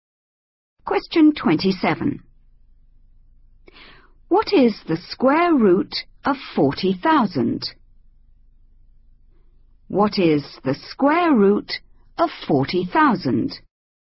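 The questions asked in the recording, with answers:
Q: What is the square root of 40,000?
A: 200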